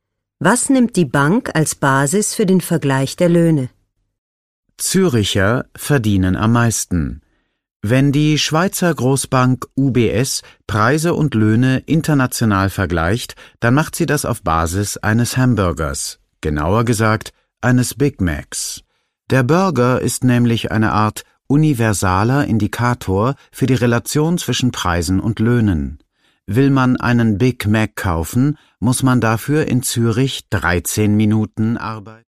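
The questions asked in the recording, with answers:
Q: Was nimmt die Bank als Basis für den Vergleich der Löhne?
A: Einen Hamburger (Big Mac)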